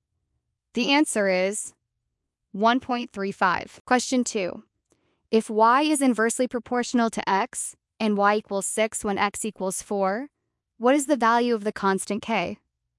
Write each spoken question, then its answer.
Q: if y is inversely proportional to x and y equals 6 when x equals 4, what is the value of the constant k?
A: K equals y times x, so 6 times 4 equals 24.